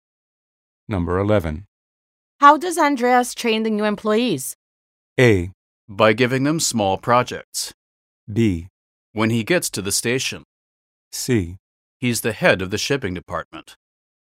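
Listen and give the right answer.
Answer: A: By giving them small projects.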